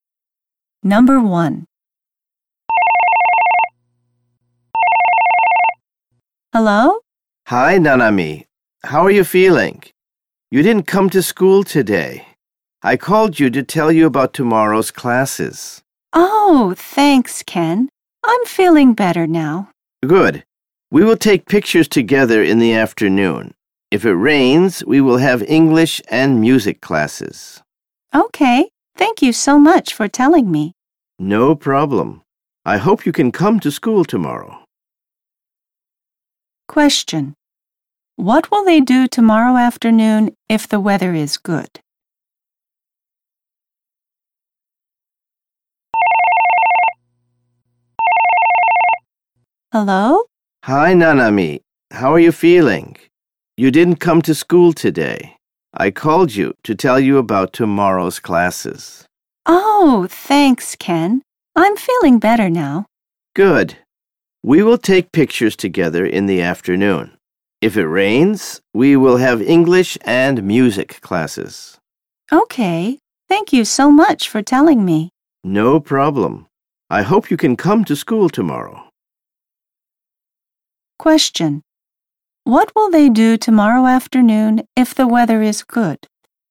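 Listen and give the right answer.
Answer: They will take pictures together.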